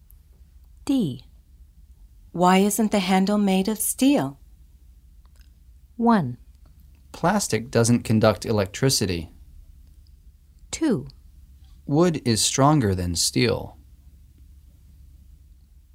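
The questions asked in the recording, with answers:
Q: Why isn't the handle made of steel?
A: 1: Plastic doesn't conduct electricity.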